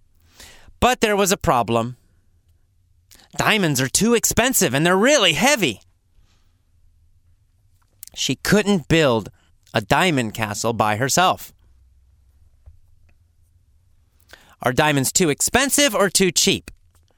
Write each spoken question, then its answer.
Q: Are diamonds too expensive or too cheap?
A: Well, of course, they're too expensive.